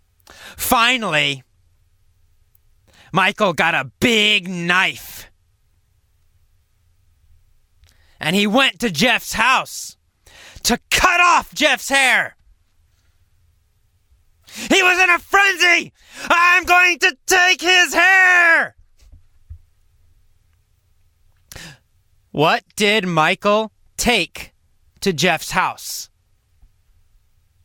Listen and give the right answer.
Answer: A big knife. Michael took a big, big knife to Jeff's house.